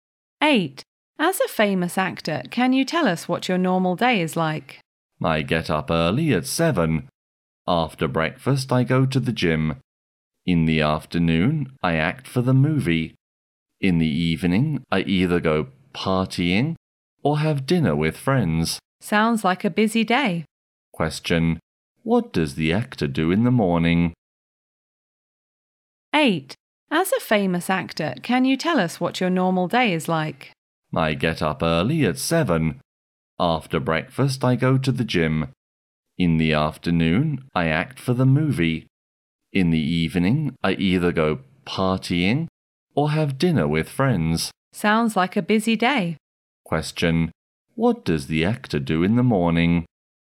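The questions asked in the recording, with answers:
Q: What does the actor do in the morning?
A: He goes to the gym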